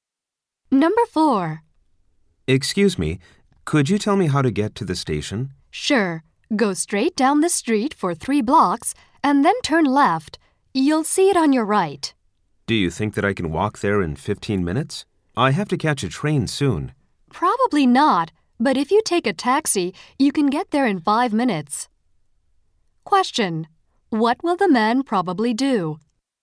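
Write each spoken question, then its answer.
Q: What will the man probably do?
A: Take a taxi to the station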